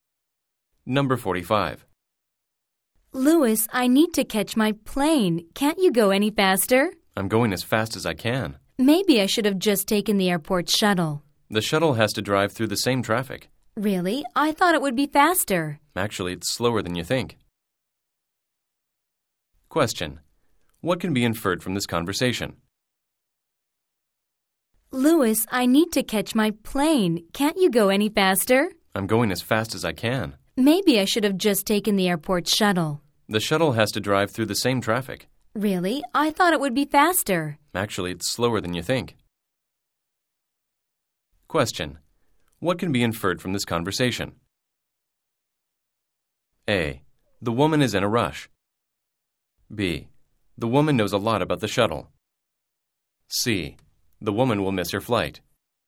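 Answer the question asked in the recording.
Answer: A: The woman is in a rush.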